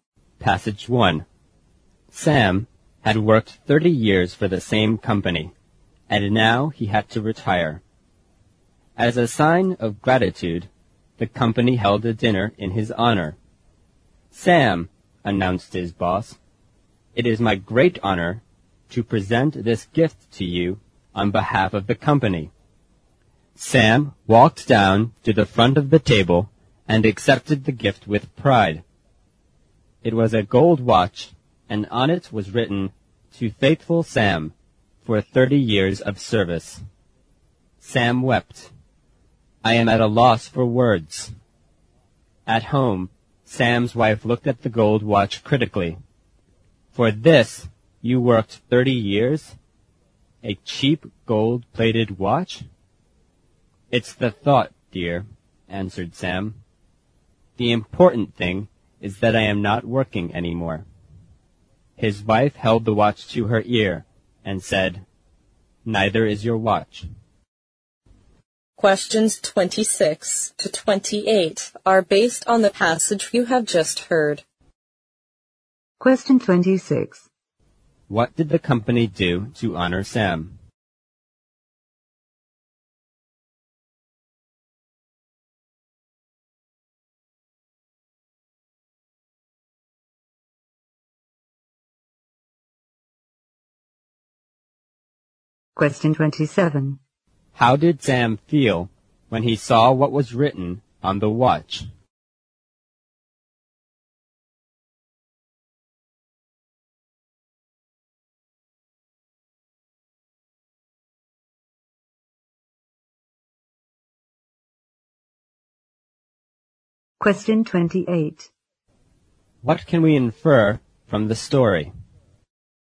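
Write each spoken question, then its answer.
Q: What did the company do to honor Sam?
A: It held a dinner in his honor and gave him a gold watch.

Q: How did Sam feel when he saw what was written on the watch?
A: Deeply moved; he wept.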